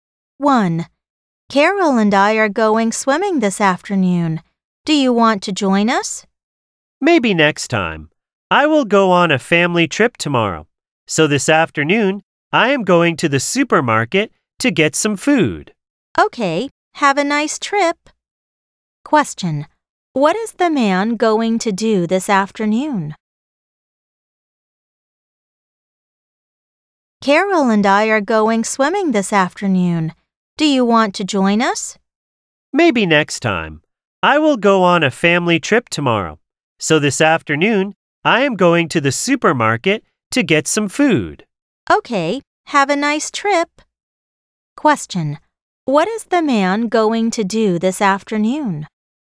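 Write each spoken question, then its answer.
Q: What is the man going to do this afternoon?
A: Go to the supermarket to get some food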